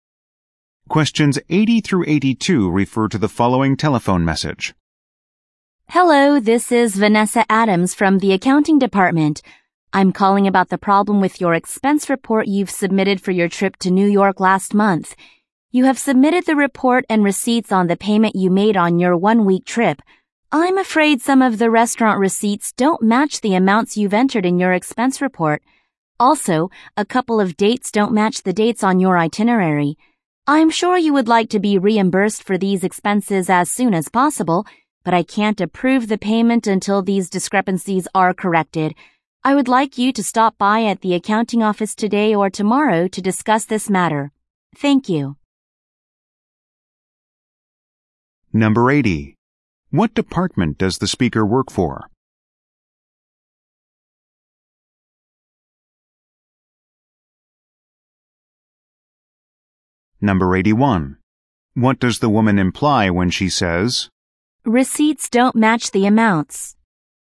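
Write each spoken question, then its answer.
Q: What department does the speaker work for?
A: Accounting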